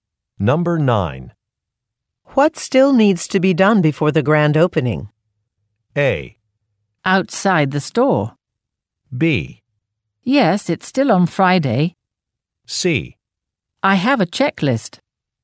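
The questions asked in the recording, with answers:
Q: What still needs to be done before the grand opening?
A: C: I have a checklist.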